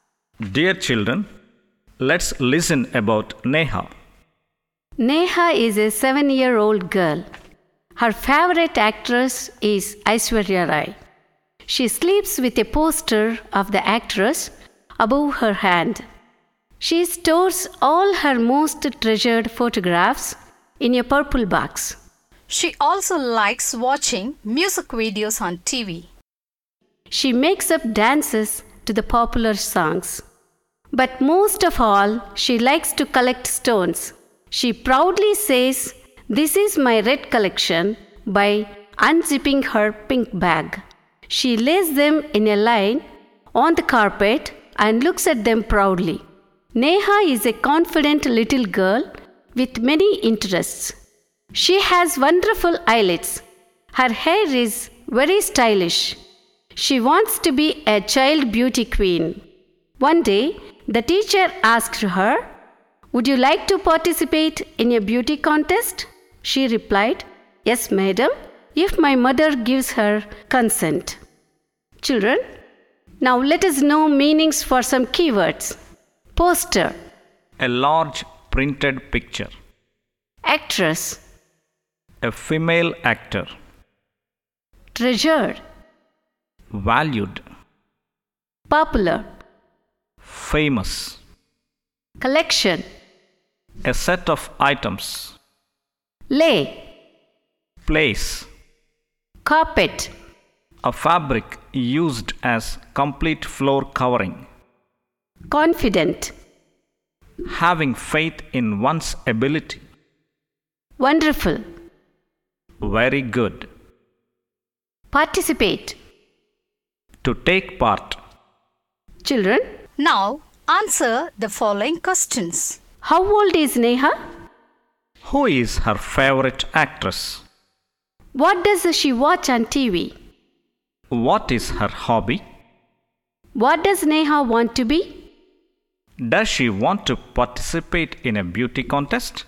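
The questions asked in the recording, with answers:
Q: How old is Neha?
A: 7 years old

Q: Who is her favorite actress?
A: Aishwarya Rai

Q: What does she watch on TV?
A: Music videos

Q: What is her hobby?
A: Collecting stones

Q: What does Neha want to be?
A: A child beauty queen

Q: Does she want to participate in a beauty contest?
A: Yes, if her mother gives her consent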